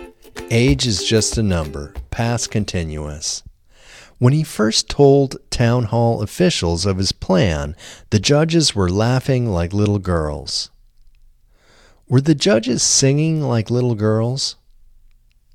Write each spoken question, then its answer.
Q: Were the judges singing like little girls?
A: No, the judges weren't singing like little girls.